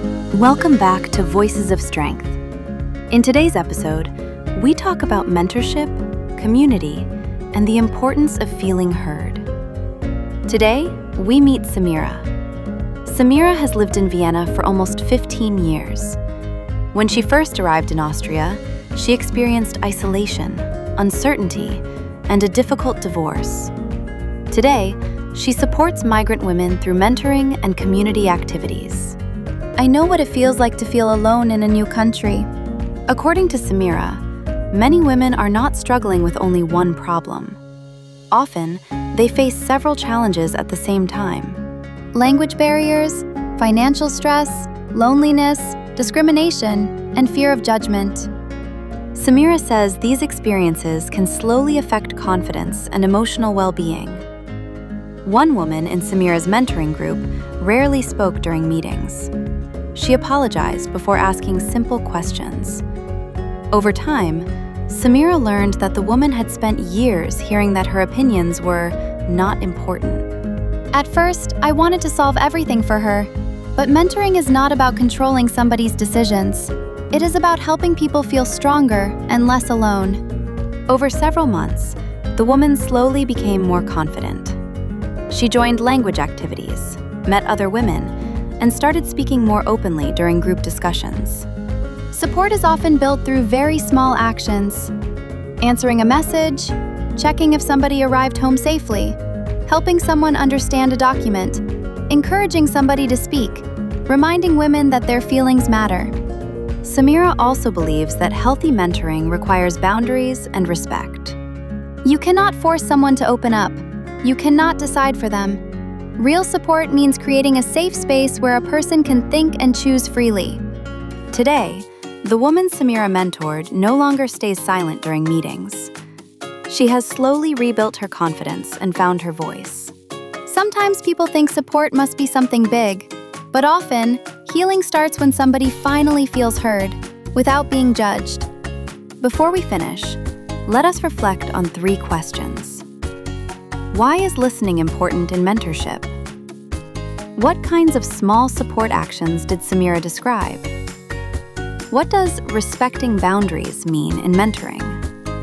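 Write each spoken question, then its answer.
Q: What kinds of small support actions did Samira describe?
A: Answering a message, checking if someone arrived home safely, helping someone understand a document, encouraging someone to speak, reminding women their feelings matter

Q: What does respecting boundaries mean in mentoring?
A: Not forcing someone to open up or deciding for them; creating a safe space where they can think and choose freely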